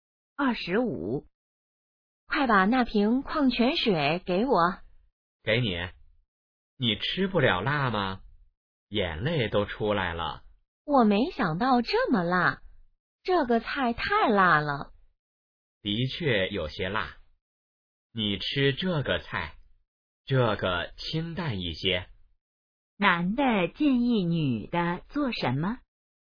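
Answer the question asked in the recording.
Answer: 吃清淡一些的菜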